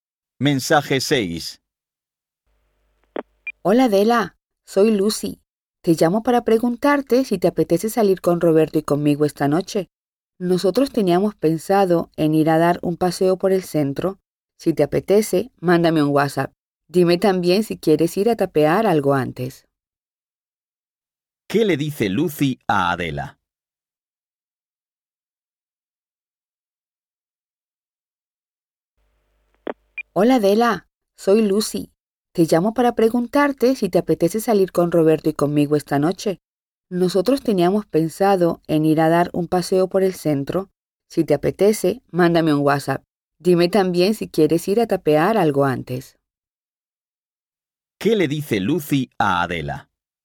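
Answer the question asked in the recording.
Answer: La invita a salir a pasear por el centro esta noche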